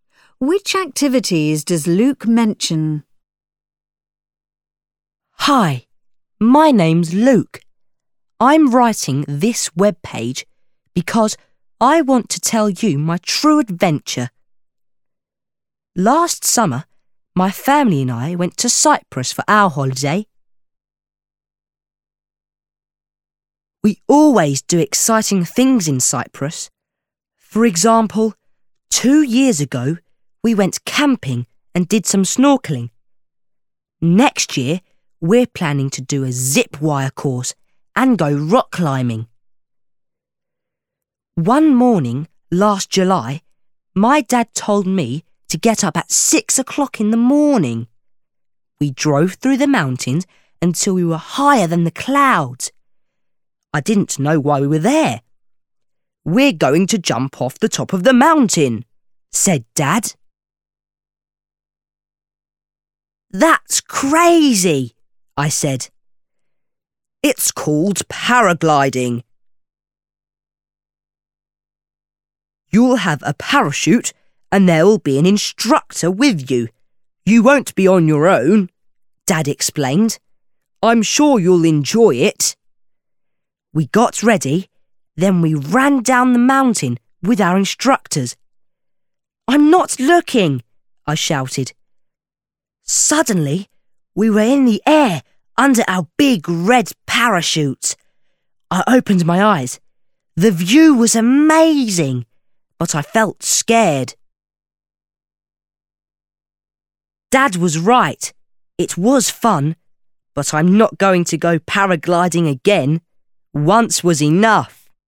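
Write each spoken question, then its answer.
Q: Which activities does Luke mention?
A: camping, snorkeling, zip wire, rock climbing and paragliding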